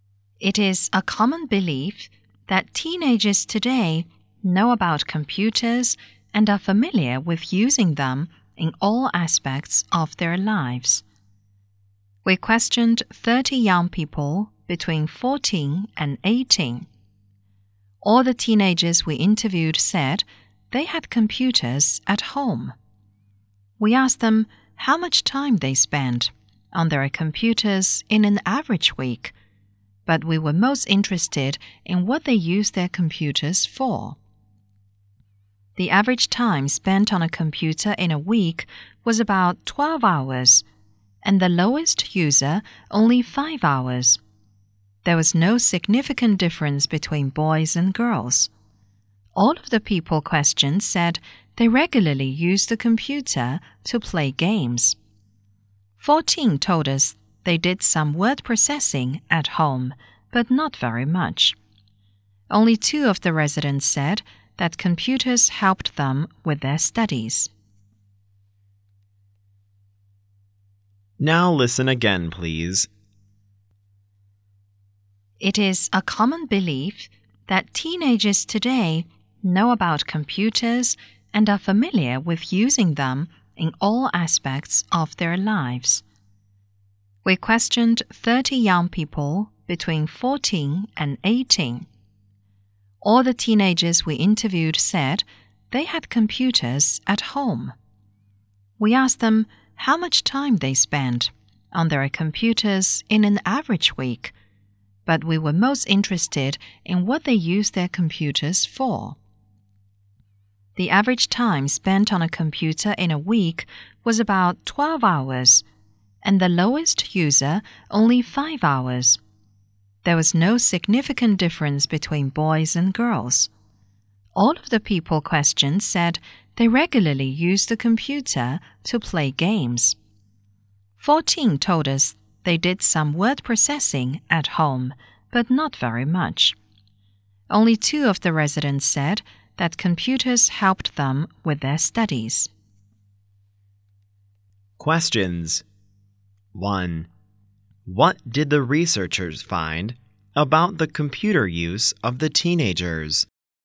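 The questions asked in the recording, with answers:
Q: What did the researchers find about the computer use of the teenagers?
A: They spent about 12 hours a week on computers on average, all played games regularly, and few used them for study.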